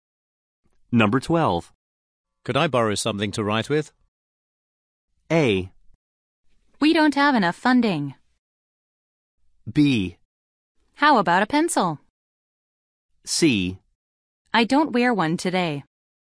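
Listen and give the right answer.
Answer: B: How about a pencil?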